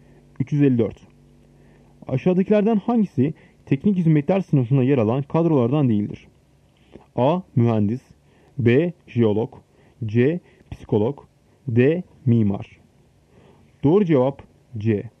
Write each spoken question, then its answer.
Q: Aşağıdakilerden hangisi teknik hizmetler sınıfına yer alan kadrolardan değildir?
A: Doğru cevap C. Psikolog.